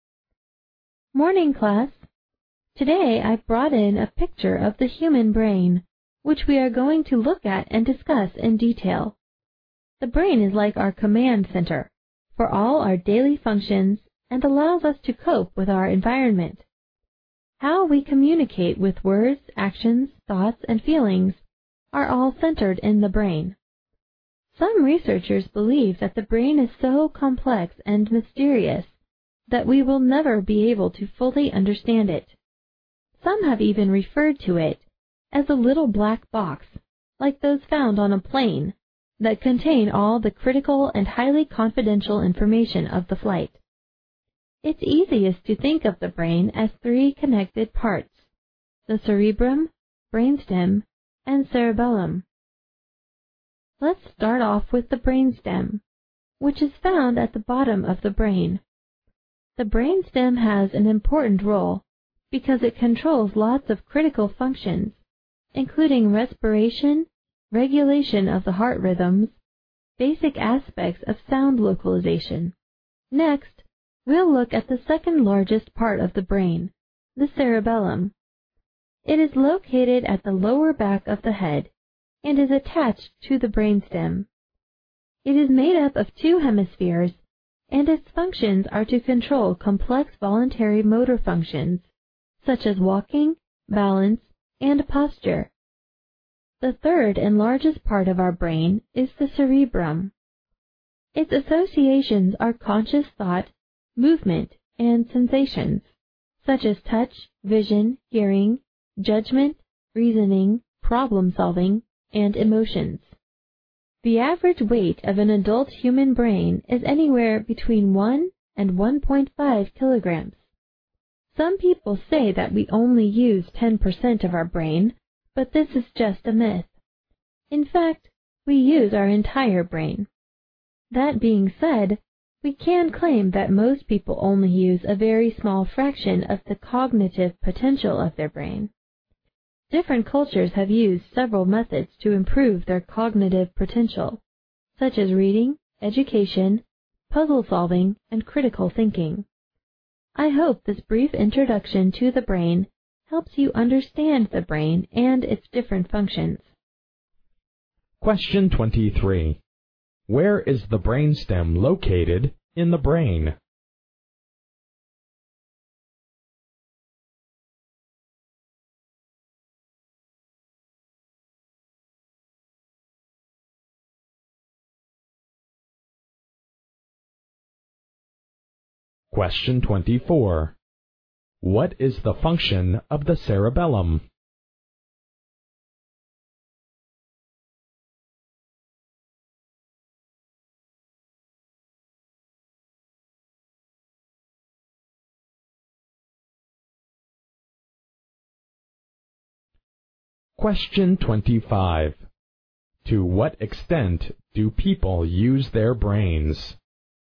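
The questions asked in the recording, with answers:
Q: Where is the brainstem located in the brain?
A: At the bottom of the brain

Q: What is the function of the cerebellum?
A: To control complex voluntary motor functions such as walking, balance and posture

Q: To what extent do people use their brains?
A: They use their entire brain, but only a small fraction of its cognitive potential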